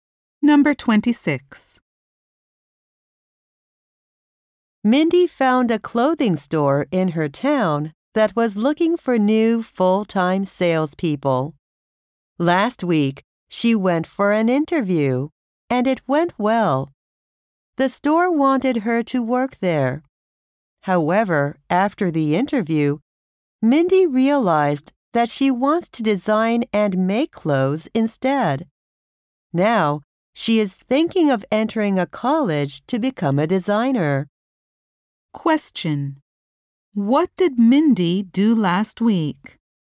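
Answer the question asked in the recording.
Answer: She had a job interview at a clothing store.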